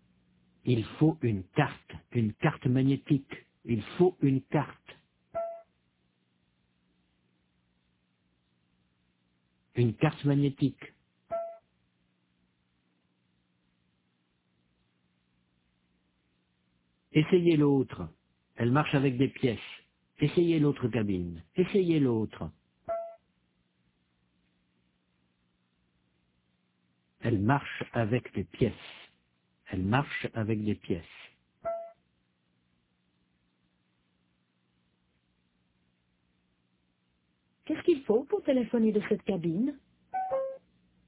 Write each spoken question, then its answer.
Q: Qu'est-ce qu'il faut pour téléphoner de cette cabine ?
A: Une carte magnétique.